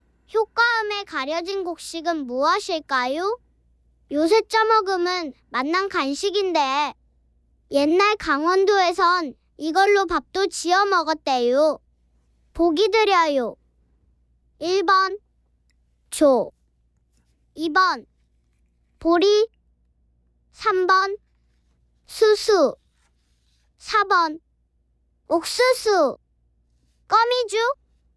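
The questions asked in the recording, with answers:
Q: 가려진 곡식은 무엇일까요?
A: 4: 옥수수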